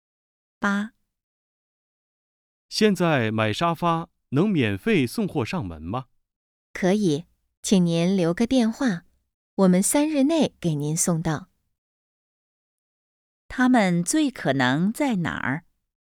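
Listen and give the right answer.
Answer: 家具店(卖沙发的商店)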